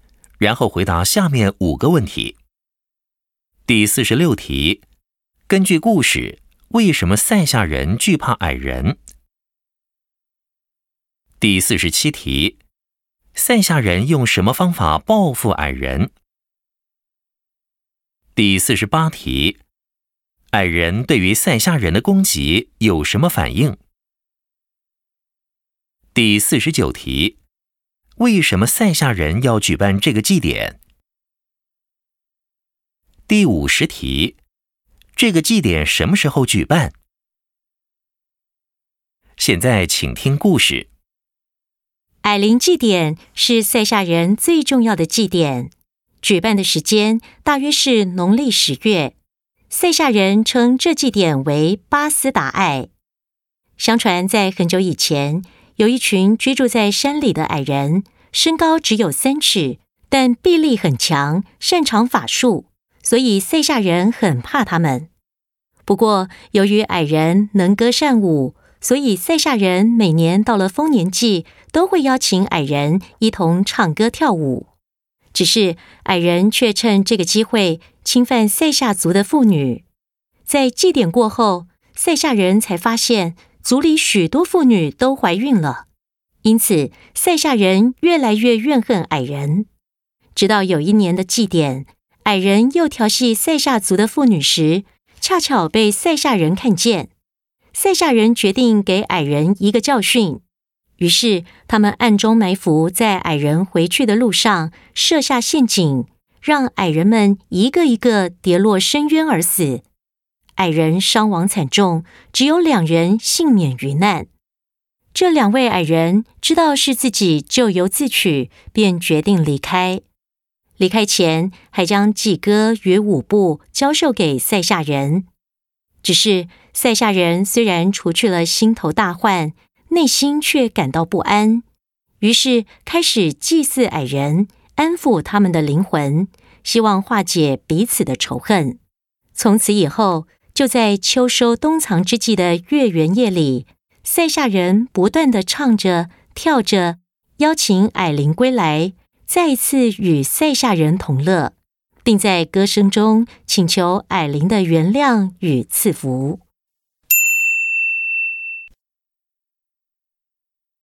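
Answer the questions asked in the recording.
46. 矮人臂力很强,擅长法术
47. 在矮人回去的路上埋伏,设下陷阱,让矮人跌落深渊而死
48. 幸存的两位矮人知道是自己咎由自取,决定离开,并把祭歌与舞步教给塞夏人
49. 为了安抚矮人的灵魂,化解仇恨,请求矮灵原谅与赐福
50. 大约农历十月,秋收冬藏之际的月圆夜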